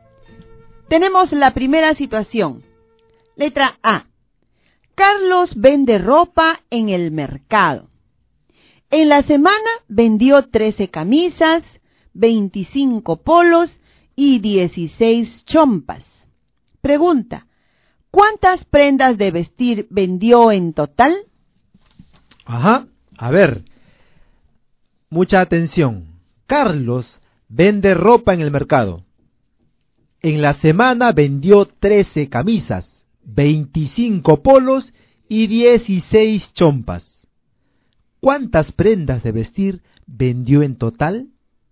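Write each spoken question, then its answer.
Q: ¿Cuántas prendas de vestir vendió en total?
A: 54 prendas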